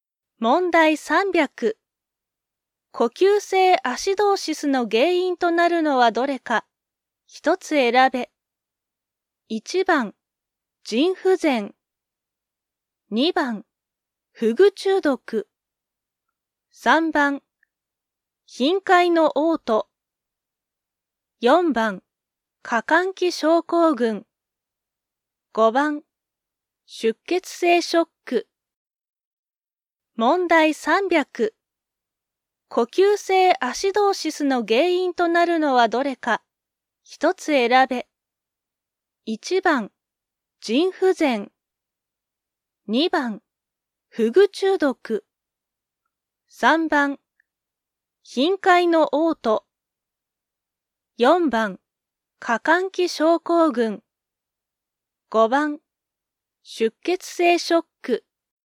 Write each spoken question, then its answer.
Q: 呼吸性アシドーシスの原因となるのはどれか、一つ選べ。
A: 2番、フグ中毒。